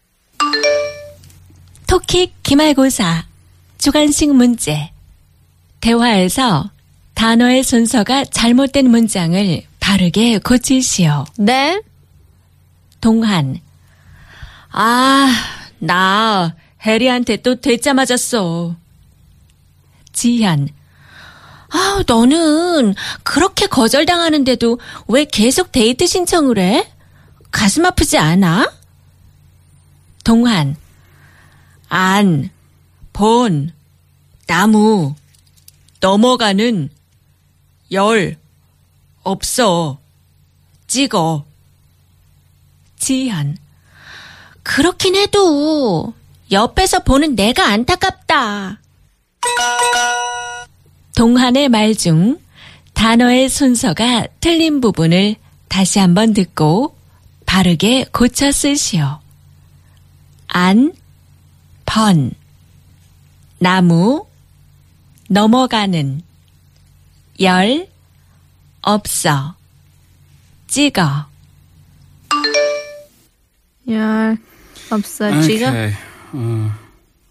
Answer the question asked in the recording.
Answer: 열 번 찍어 안 넘어가는 나무 없어.